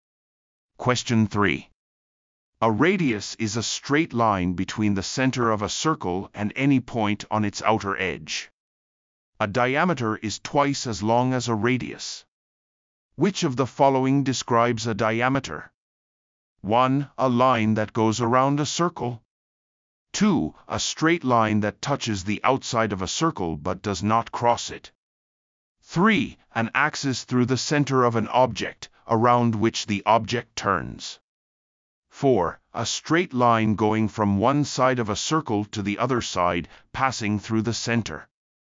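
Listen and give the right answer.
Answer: 4: A straight line going from one side of a circle to the other side, passing through the center.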